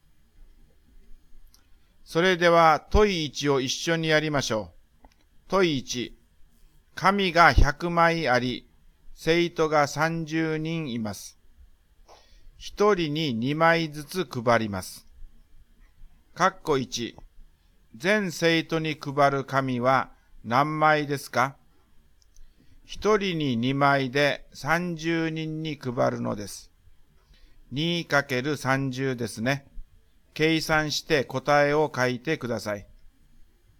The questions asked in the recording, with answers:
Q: 全生徒に配る紙は何枚ですか ?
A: 配った紙は 2×30 で60枚です。